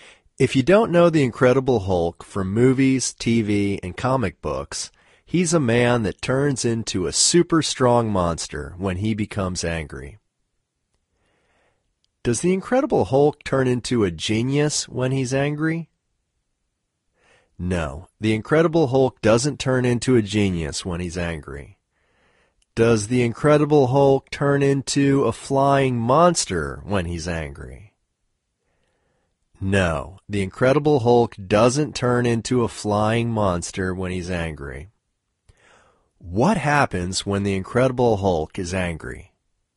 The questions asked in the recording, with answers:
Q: What happens when the Incredible Hulk is angry?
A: When the Incredible Hulk is angry, he turns into a super strong monster.